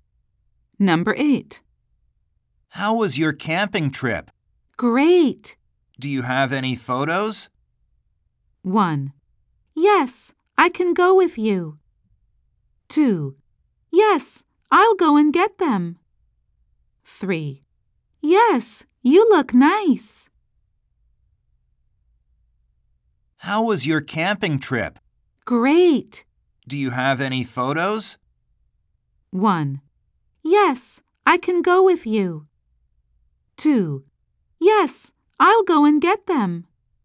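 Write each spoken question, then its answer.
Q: Do you have any photos?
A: 2: Yes, I'll go and get them.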